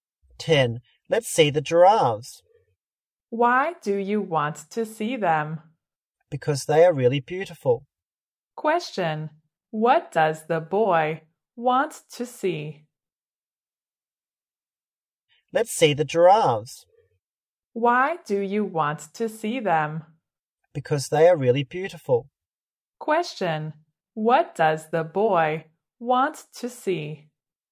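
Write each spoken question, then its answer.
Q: Question, what does the boy want to see?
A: The giraffes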